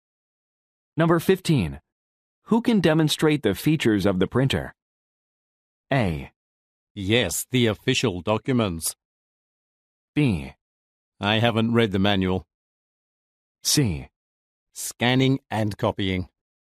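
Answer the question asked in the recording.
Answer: B: I haven't read the manual.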